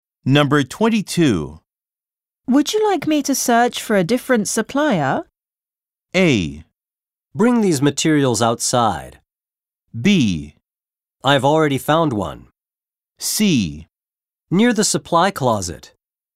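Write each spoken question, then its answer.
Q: Would you like me to search for a different supplier?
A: B: I've already found one.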